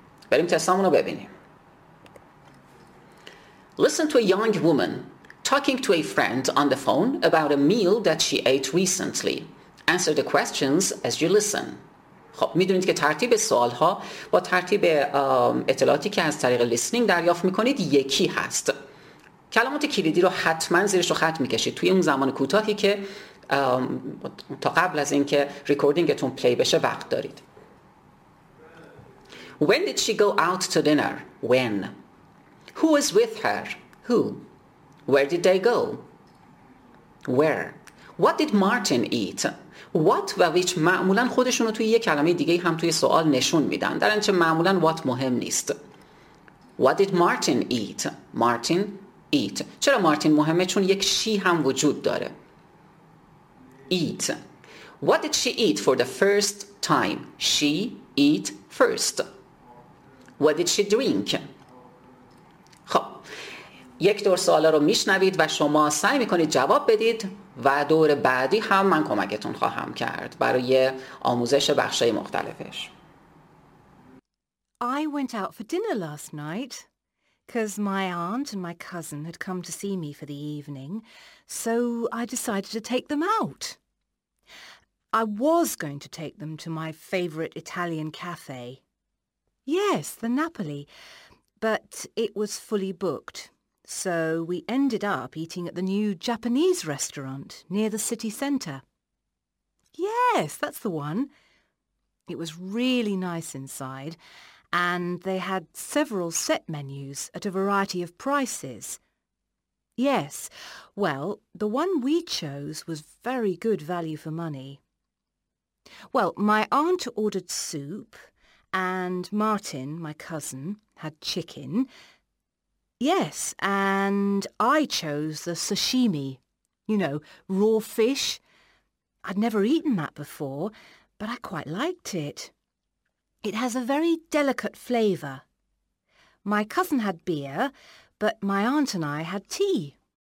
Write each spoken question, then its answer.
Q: When did she go out to dinner?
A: جوابتون last night.

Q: Who was with her?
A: پس aunt, comma, cousin میتونه بهترین جواب باشه.

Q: Where did they go?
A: New Japanese restaurant.

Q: What did Martin eat?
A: پس جواب آیتم دی, chicken.

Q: What did she eat for the first time?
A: Sashimi. S-A-S-H-I-M-I. Sashimi.

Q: What did she drink?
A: پس فقط یک کلمه tea رو, T-E-A رو جلوی آیتم F می نویسیم